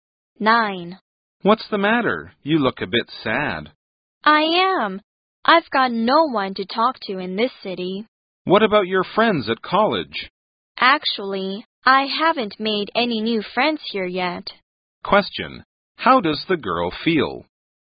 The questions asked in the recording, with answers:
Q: Question, how does the girl feel?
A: She feels lonely.